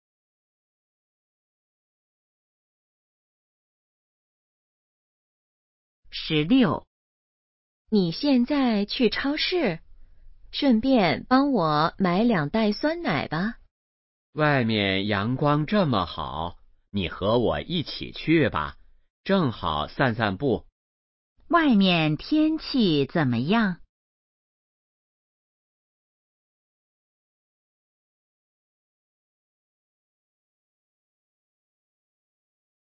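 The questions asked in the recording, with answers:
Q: 外面天气怎么样?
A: 阳光很好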